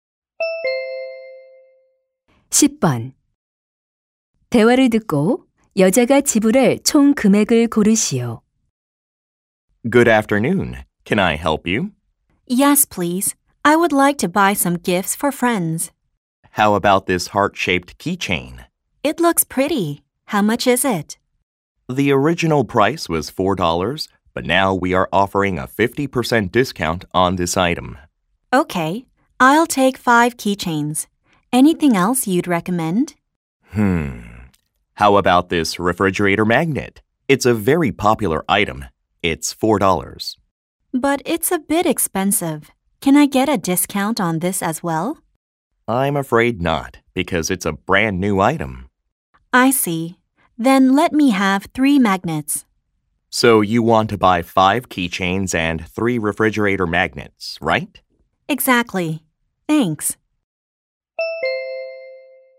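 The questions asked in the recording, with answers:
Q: 대화를 듣고 여자가 지불할 총 금액을 고르시오.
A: 22달러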